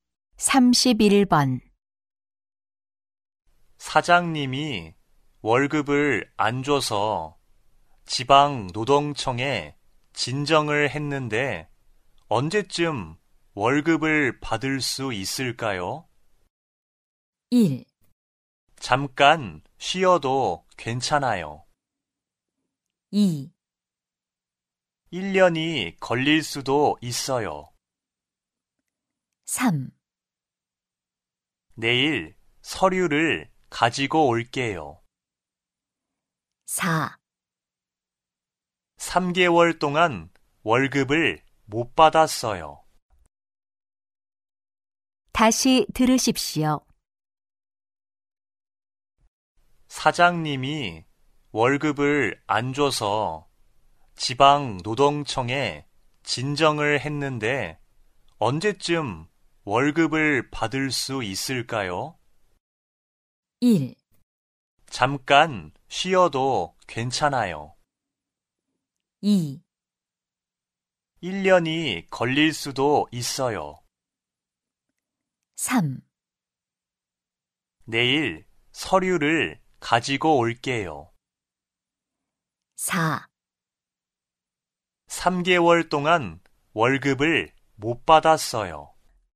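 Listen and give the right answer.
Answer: 2: 1년이 걸릴 수도 있어요.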